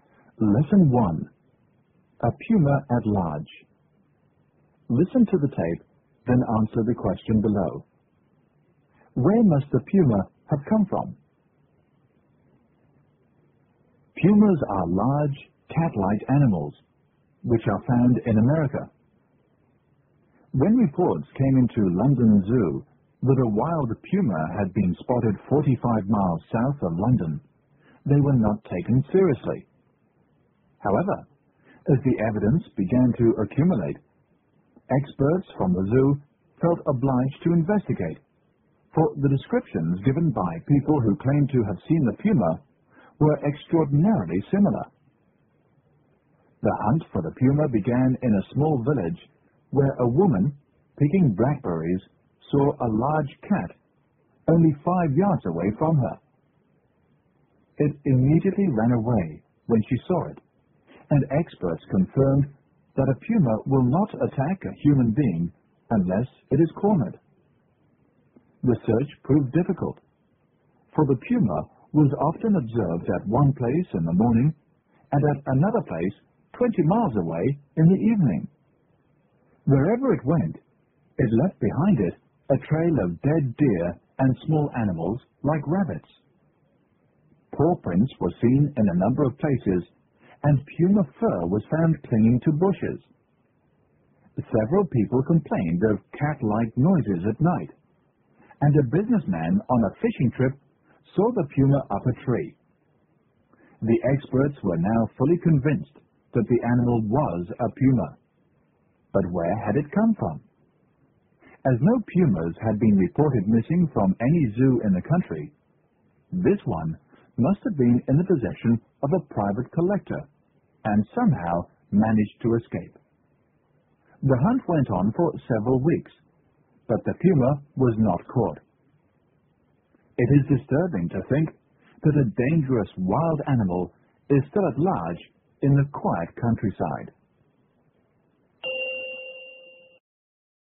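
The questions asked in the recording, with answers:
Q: Where must the puma have come from?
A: From a private collector, from whom it must have escaped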